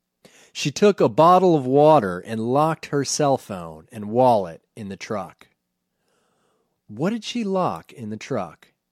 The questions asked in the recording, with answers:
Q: What did she lock in the truck?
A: She locked her cell phone and wallet in the truck.